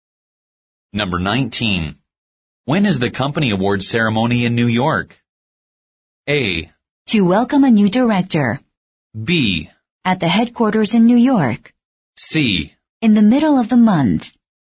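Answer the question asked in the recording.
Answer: C: In the middle of the month.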